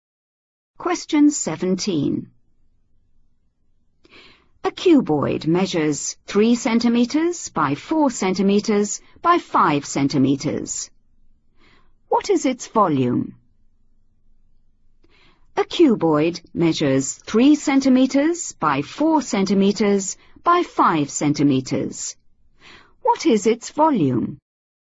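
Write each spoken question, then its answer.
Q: What is its volume?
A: 60 cubic centimetres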